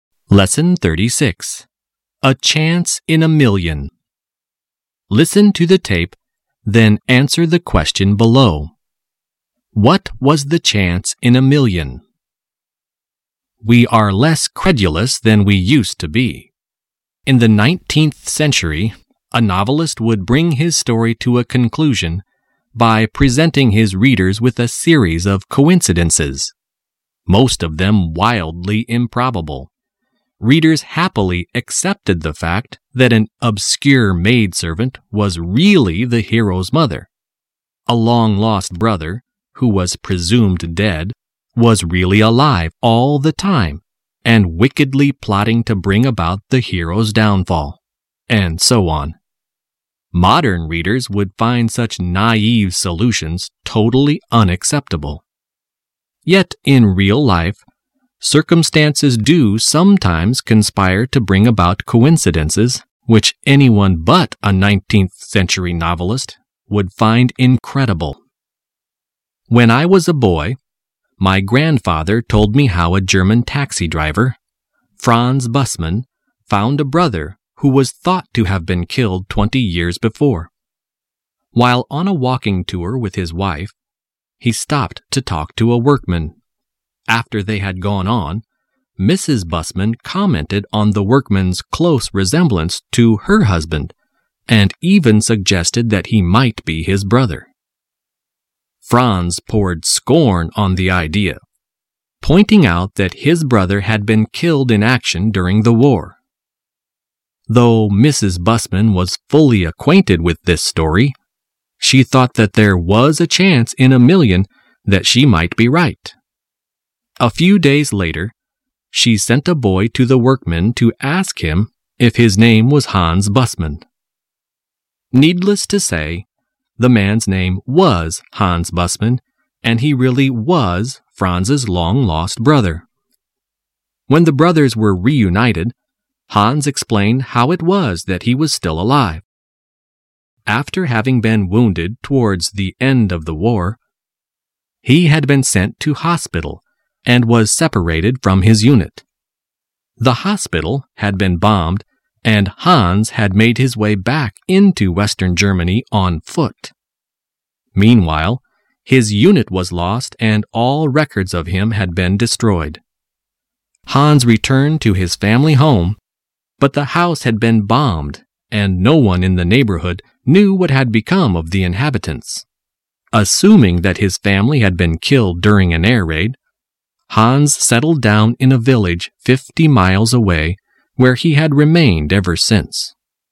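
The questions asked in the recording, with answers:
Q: What was the chance in a million?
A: That the workman who looked like Franz was really his long-lost brother Hans, who was thought to have been killed in the war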